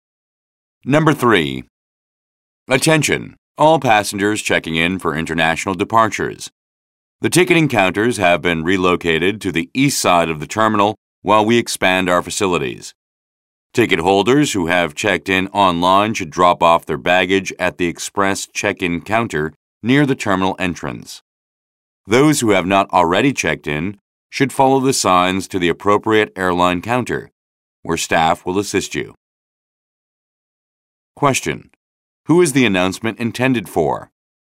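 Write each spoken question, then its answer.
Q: Who is the announcement intended for?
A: Passengers checking in for international departures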